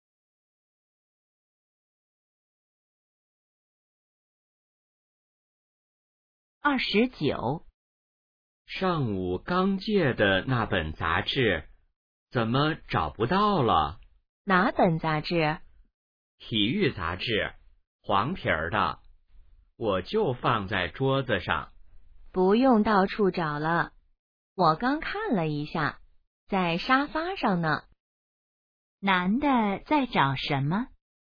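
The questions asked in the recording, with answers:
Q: 男的在找什么?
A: 体育杂志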